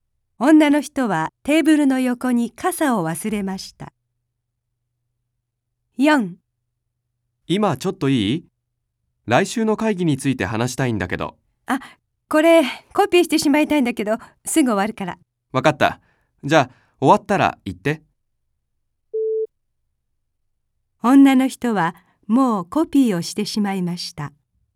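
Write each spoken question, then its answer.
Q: 女の人はもうコピーをしてしまいました。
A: 正しくない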